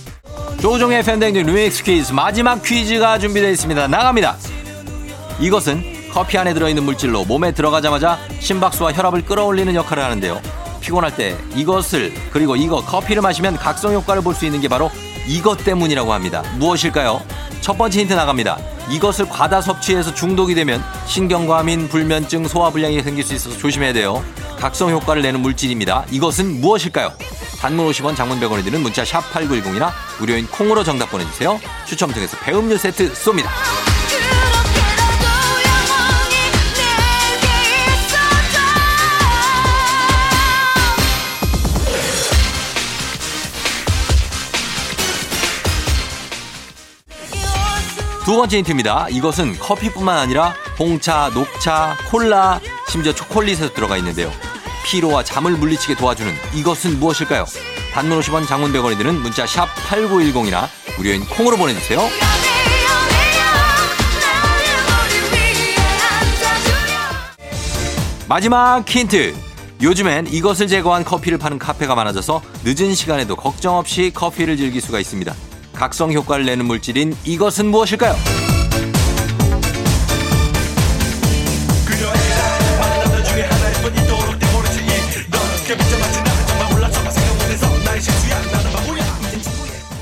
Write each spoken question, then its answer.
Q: 각성 효과를 내는 물질인 이것은 무엇일까요?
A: 카페인이죠.